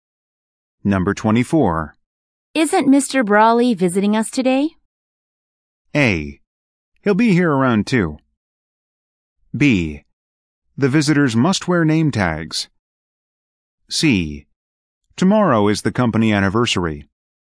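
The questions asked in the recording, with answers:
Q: Isn't Mr. Brawley visiting us today?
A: A: He'll be here around 2.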